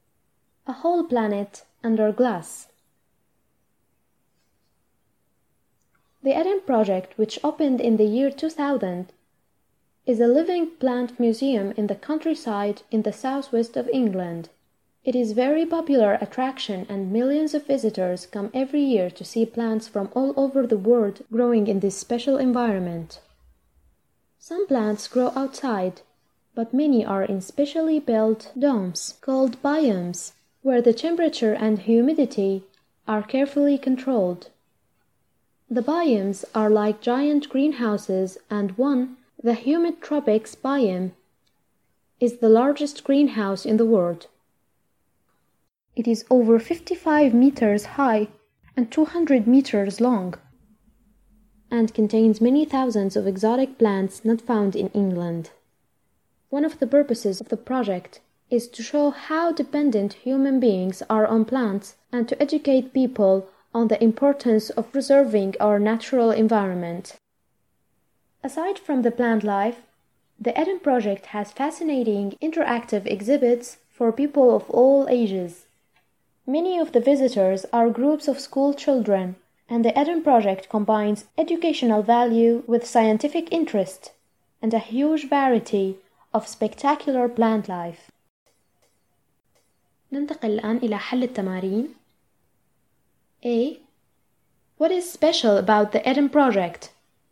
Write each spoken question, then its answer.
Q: What is special about the Eden Project?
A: It is a museum of living plants.